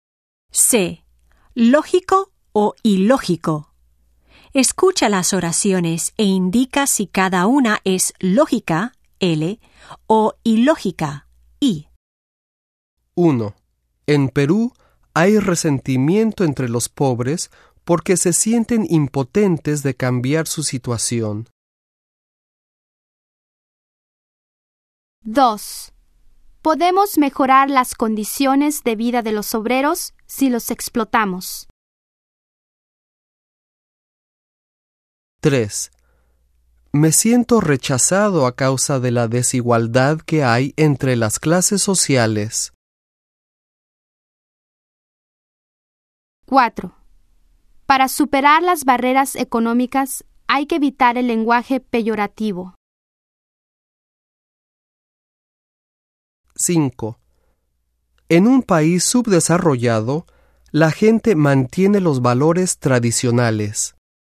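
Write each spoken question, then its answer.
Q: En Perú hay resentimiento entre los pobres porque se sienten impotentes de cambiar su situación.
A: Lógica

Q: Podemos mejorar las condiciones de vida de los obreros si los explotamos.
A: Ilógica

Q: Me siento rechazado a causa de la desigualdad que hay entre las clases sociales.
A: Lógica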